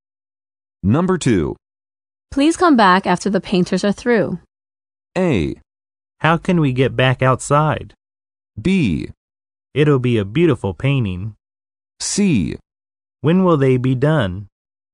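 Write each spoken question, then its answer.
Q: Please come back after the painters are through.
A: C: When will they be done?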